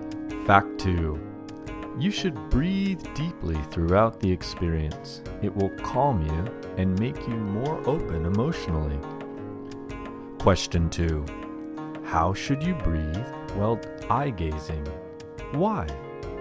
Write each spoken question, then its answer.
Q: How should you breathe while eye gazing?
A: You should breathe deeply throughout the experience.